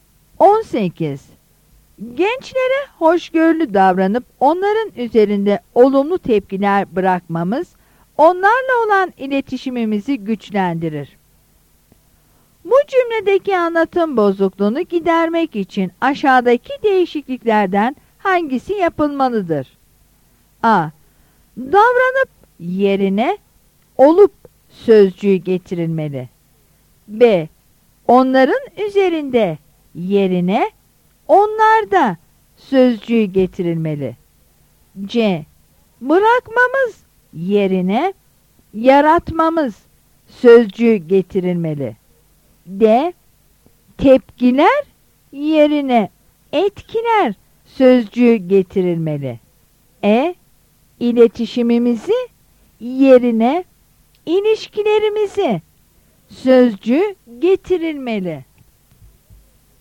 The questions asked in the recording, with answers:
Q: Bu cümledeki anlatım bozukluğunu gidermek için aşağıdaki değişikliklerden hangisi yapılmalıdır?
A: Yanıt D'dir.